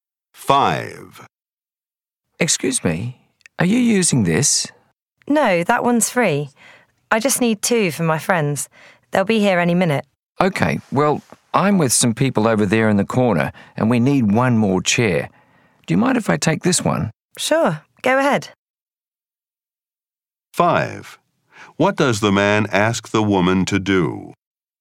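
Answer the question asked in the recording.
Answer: Let him take the free chair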